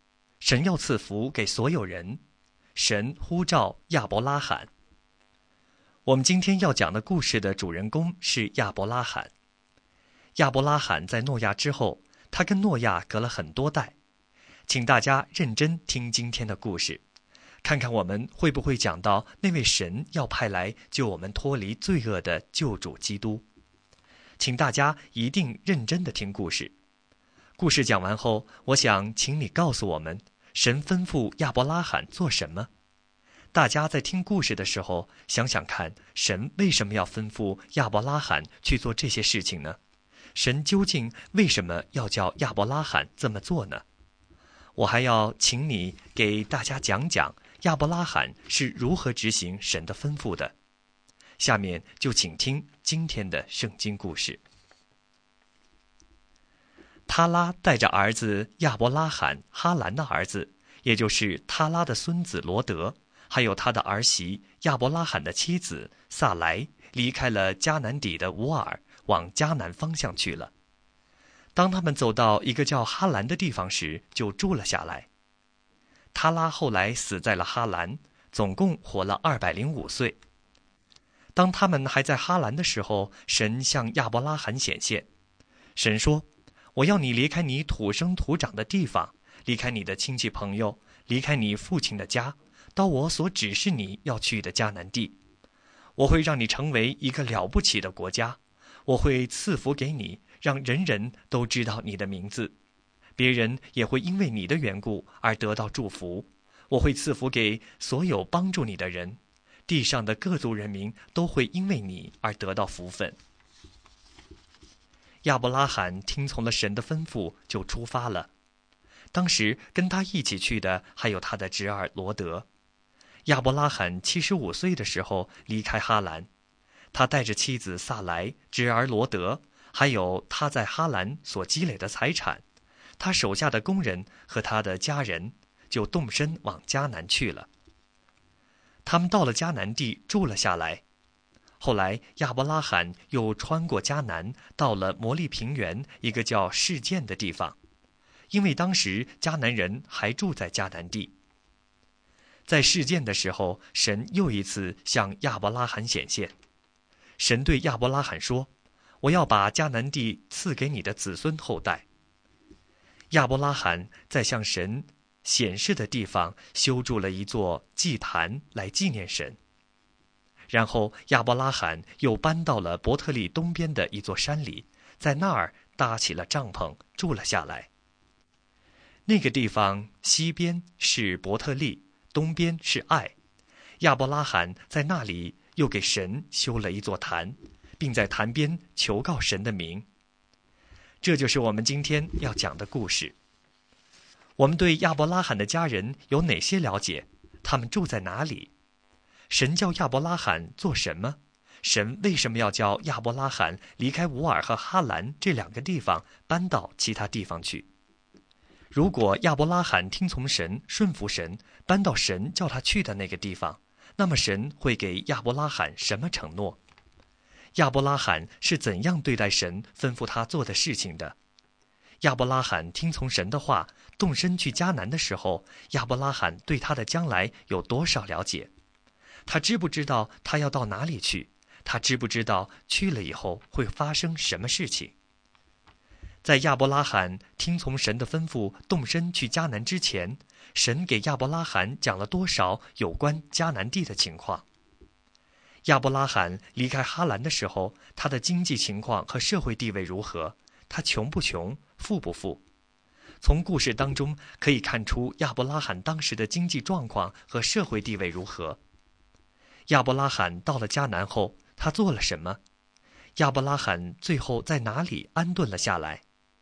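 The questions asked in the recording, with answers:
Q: 神叫亚伯拉罕做什么?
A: 离开本地、亲族和父家,到神指示的迦南地去

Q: 亚伯拉罕是怎样对待神吩咐他做的事情的?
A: 听从了神的吩咐,就出发了

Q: 亚伯拉罕到了迦南后,他做了什么?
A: 在神向他显现的地方修筑祭坛纪念神,并求告神的名

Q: 亚伯拉罕最后在哪里安顿了下来?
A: 伯特利东边的山里,西边是伯特利,东边是艾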